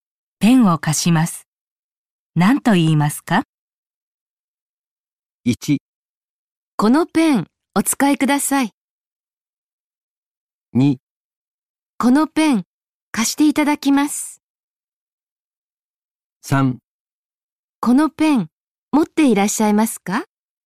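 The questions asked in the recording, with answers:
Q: ペンを持っていません。ペンを貸します。何と言いますか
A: 1: このペン、お使いください。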